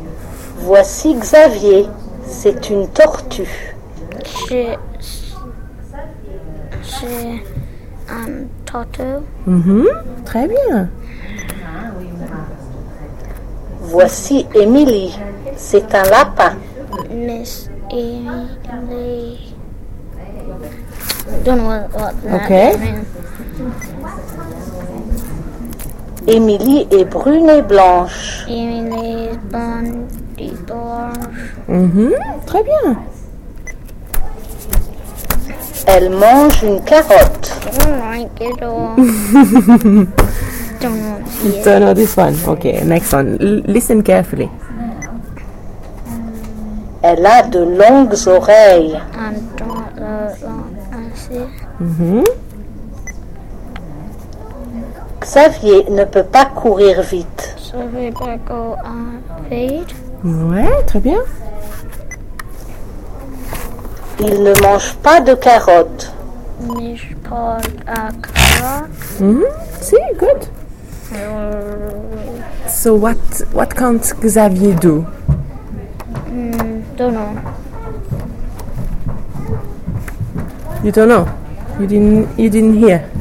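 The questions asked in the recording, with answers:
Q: So what can't Xavier do?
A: Run fast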